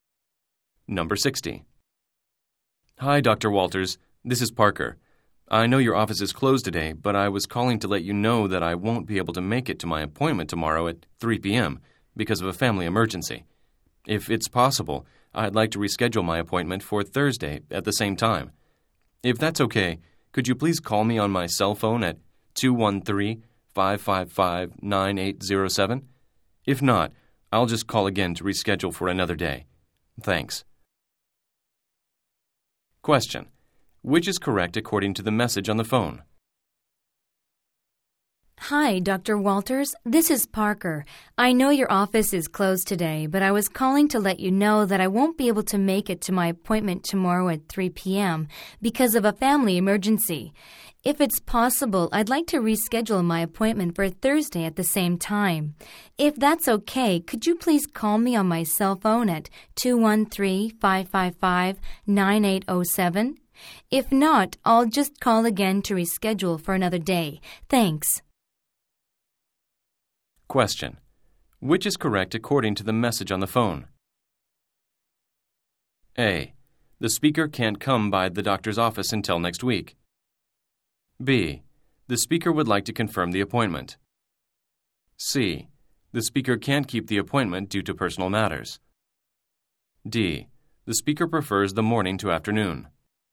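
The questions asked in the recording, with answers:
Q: Which is correct according to the message on the phone?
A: C: The speaker can't keep the appointment due to personal matters.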